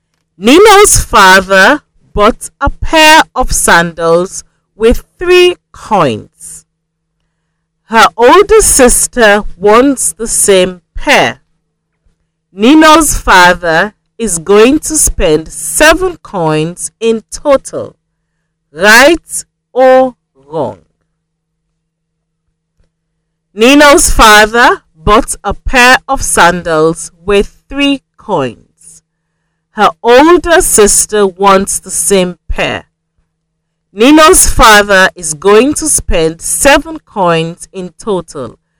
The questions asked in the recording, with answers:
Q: Right or wrong?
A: So the statement is wrong.